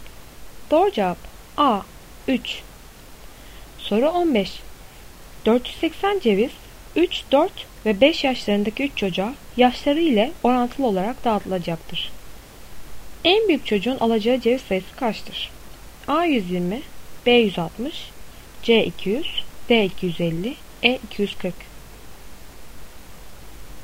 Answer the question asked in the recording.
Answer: Doğru cevap C 200.